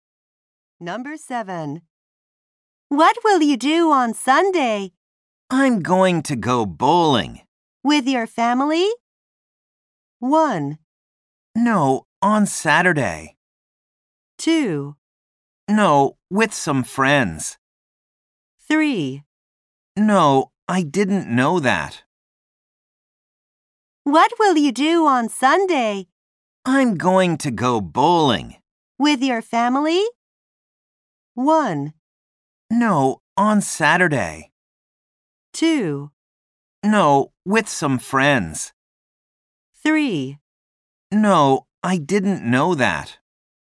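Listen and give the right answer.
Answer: 2: No, with some friends.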